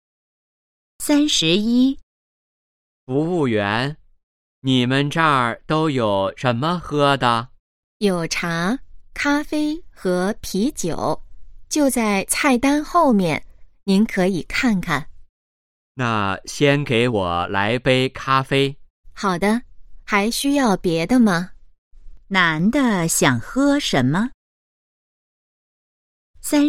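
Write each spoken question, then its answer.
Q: 男的想喝什么?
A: 咖啡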